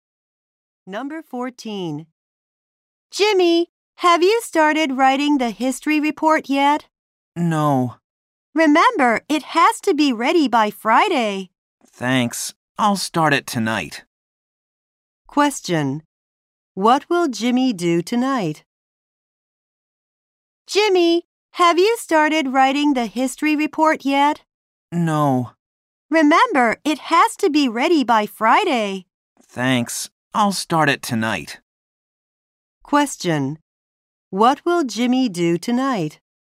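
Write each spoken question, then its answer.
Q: What will Jimmy do tonight?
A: Start writing his history report.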